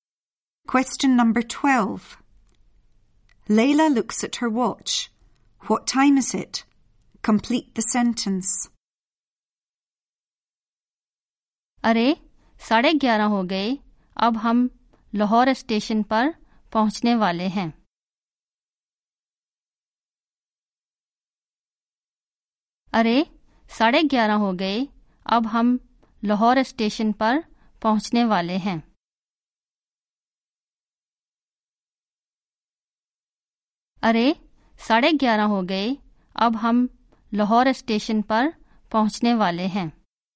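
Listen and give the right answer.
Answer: 11:30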